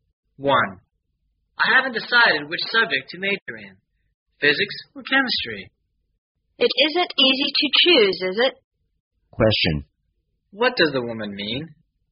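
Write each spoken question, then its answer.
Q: What does the woman mean?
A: Choosing between physics and chemistry is hard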